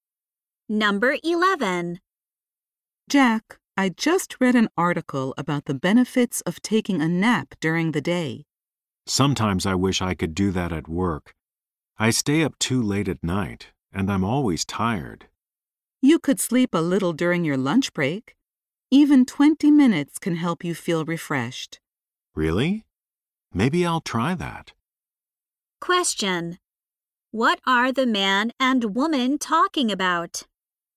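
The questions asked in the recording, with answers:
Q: What are the man and woman talking about?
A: Taking a short nap during the day.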